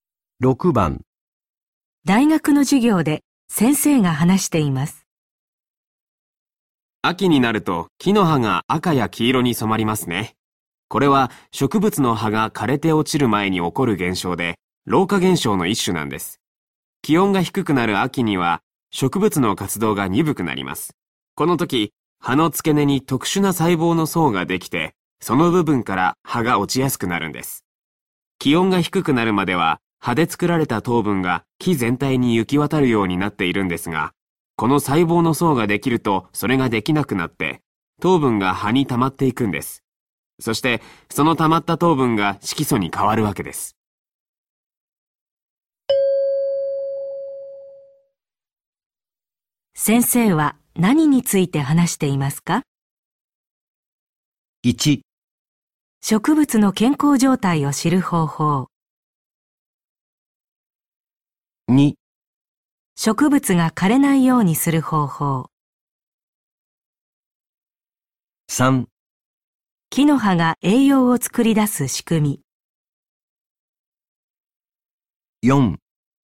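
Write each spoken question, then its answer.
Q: 先生は何について話していますか?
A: 4: 木の葉が色づく仕組み。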